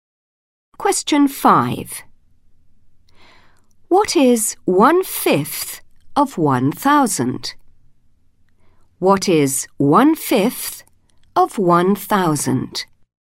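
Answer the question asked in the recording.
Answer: 200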